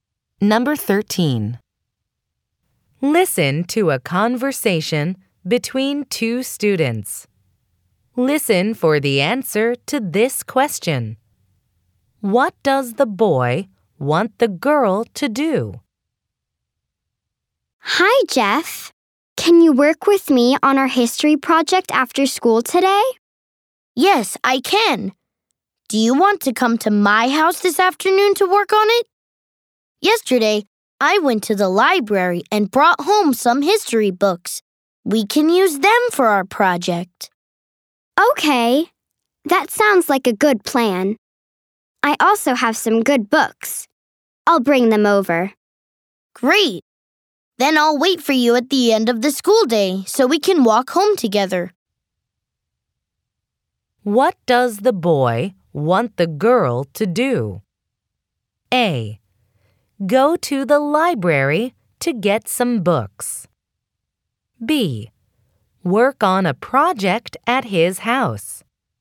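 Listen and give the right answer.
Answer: B: Work on a project at his house.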